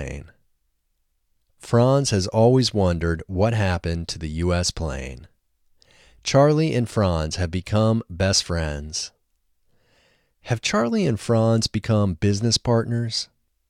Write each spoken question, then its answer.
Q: Have Charlie and Franz become business partners?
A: No, Charlie and Franz haven't become business partners.